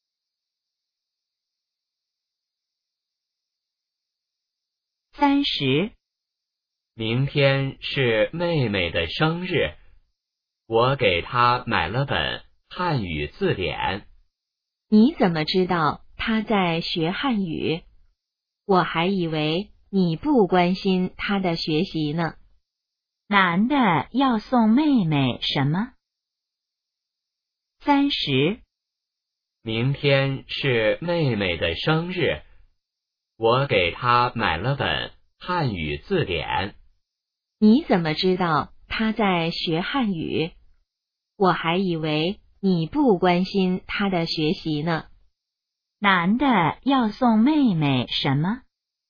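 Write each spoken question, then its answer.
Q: 男的要送妹妹什么?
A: 汉语字典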